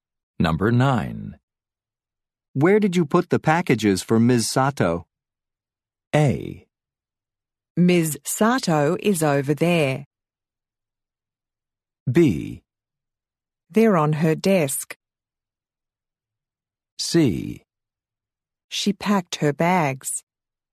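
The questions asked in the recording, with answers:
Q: Where did you put the packages for Ms. Sato?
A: B: They're on her desk.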